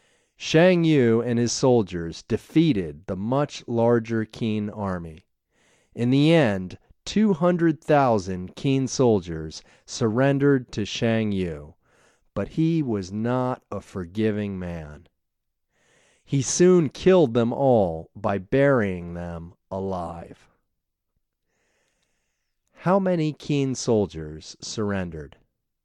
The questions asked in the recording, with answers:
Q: How many Qin soldiers surrendered?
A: Two 200,000 soldiers surrendered.